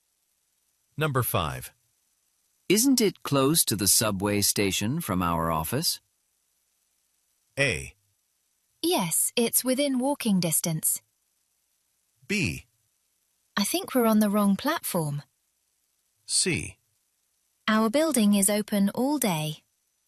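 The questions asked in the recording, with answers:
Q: Isn't it close to the subway station from our office?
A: A: Yes, it's within walking distance.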